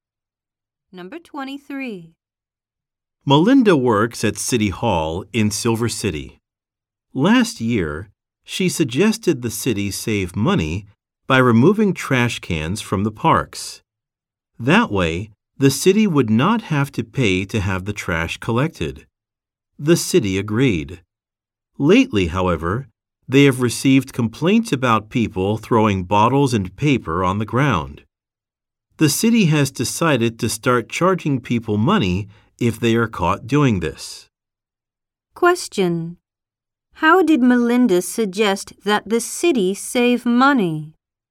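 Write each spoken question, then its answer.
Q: How did Melinda suggest that the city save money?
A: By removing trash cans from the parks.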